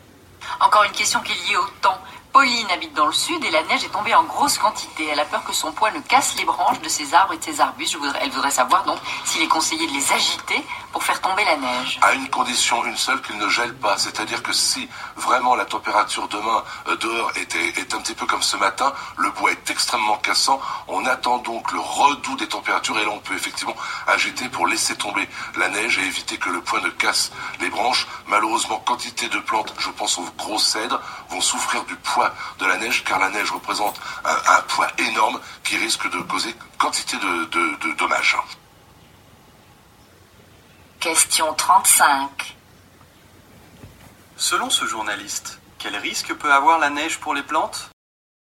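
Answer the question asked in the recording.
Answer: Son poids peut casser les branches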